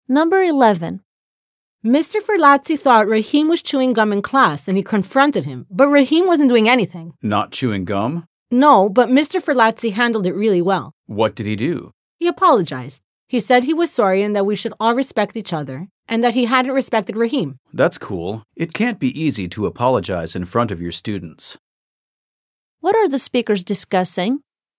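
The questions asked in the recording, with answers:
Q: What are the speakers discussing?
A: How a teacher, Mr. Ferlazzi, apologized to Rahim after wrongly accusing him of chewing gum in class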